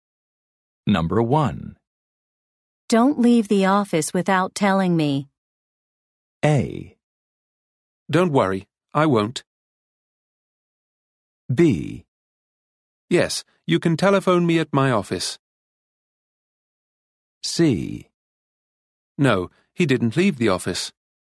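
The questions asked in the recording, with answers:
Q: Don't leave the office without telling me.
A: A: Don't worry, I won't.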